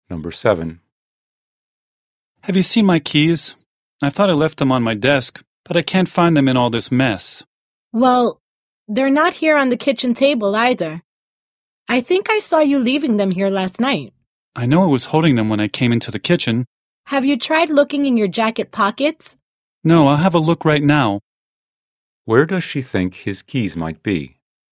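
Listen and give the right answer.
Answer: In his jacket pockets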